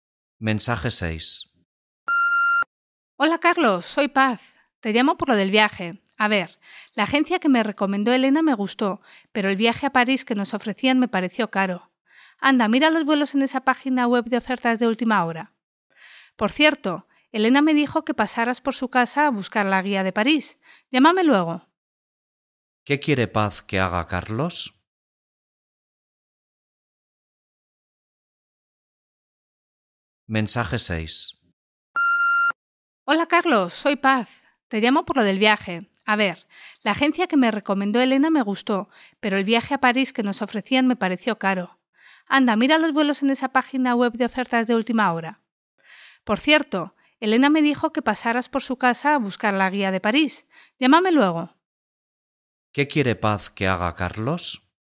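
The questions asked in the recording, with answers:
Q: ¿Qué quiere Paz que haga Carlos?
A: Que mire vuelos en una página web de ofertas de última hora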